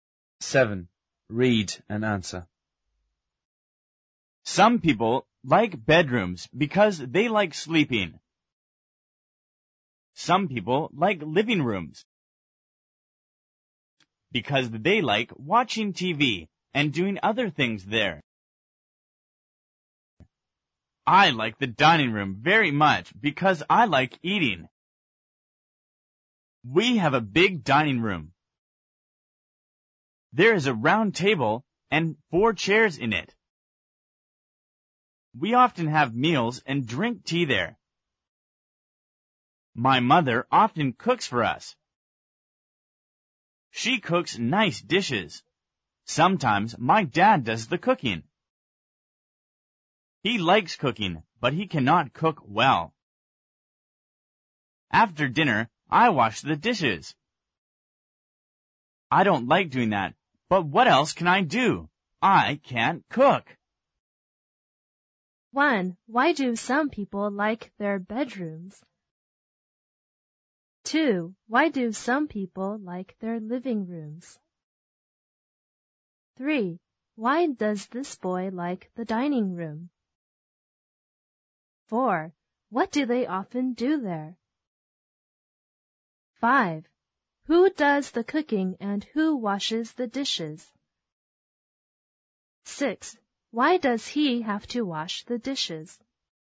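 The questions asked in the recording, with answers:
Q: Why do some people like their bedrooms?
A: Because they like sleeping.

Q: Why do some people like their living rooms?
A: Because they like watching TV and doing other things there.

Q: Why does this boy like the dining room?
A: Because he likes eating.

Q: What do they often do there?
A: They have meals and drink tea.

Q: Who does the cooking and who washes the dishes?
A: His mother (sometimes his dad) cooks; he washes the dishes.

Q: Why does he have to wash the dishes?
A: Because he can't cook.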